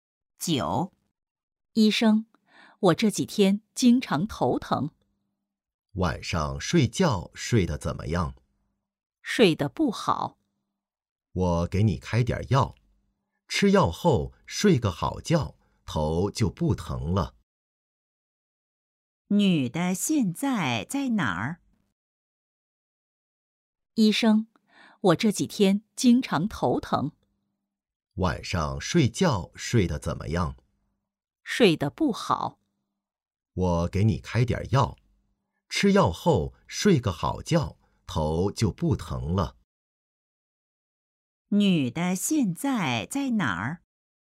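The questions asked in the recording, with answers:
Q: 女的现在在哪儿?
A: 医院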